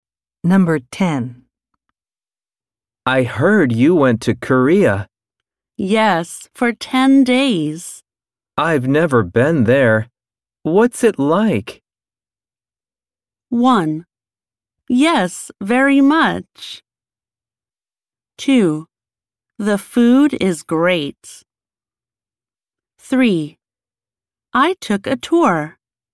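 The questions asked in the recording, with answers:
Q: I've never been there. What's it like?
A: 2: The food is great.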